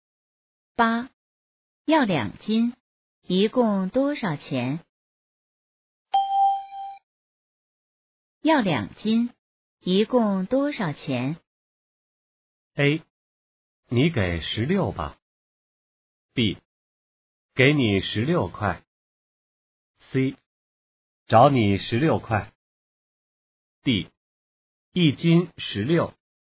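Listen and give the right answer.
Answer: A: 你给十六吧。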